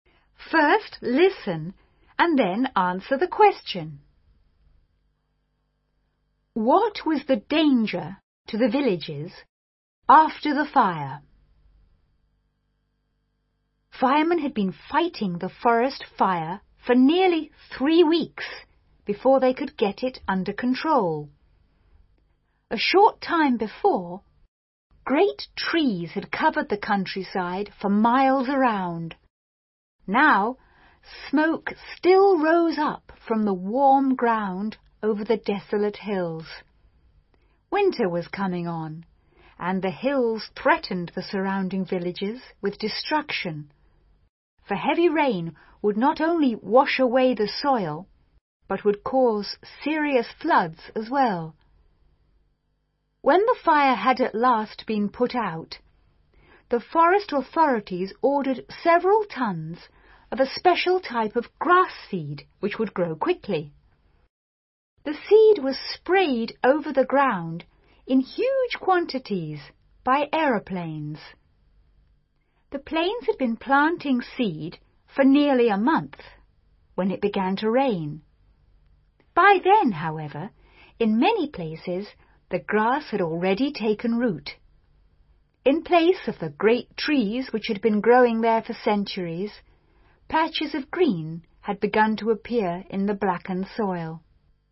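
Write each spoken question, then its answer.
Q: What was the danger to the villages after the fire?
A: Heavy rain could wash away the soil and cause serious floods.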